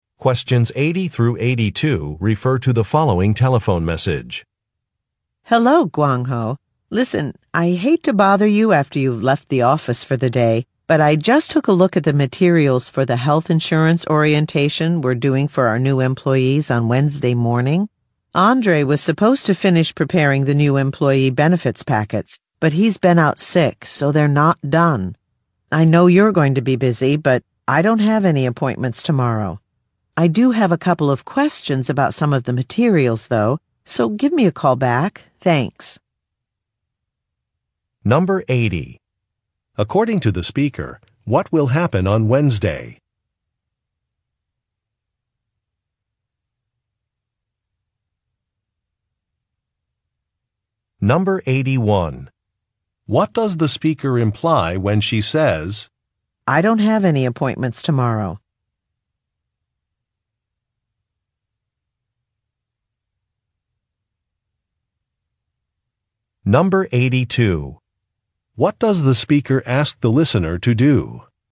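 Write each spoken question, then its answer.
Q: According to the speaker, what will happen on Wednesday?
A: A health insurance orientation for new employees

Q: What does the speaker imply when she says, "I don't have any appointments tomorrow"?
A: She can finish preparing the benefits packets herself

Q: What does the speaker ask the listener to do?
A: Call her back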